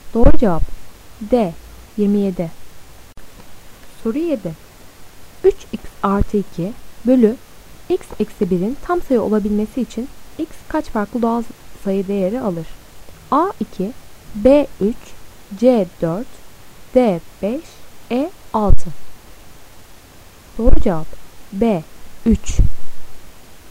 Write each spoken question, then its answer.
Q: 3x artı 2 bölü x eksi 1'in tam sayı olabilmesi için x kaç farklı doğal sayı değeri alır?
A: Doğru cevap B 3.